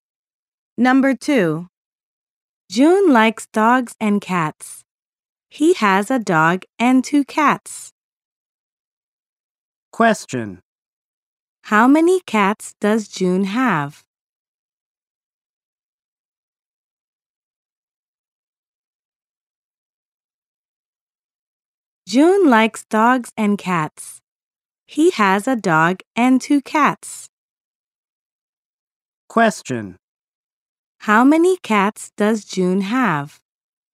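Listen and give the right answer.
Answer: Two.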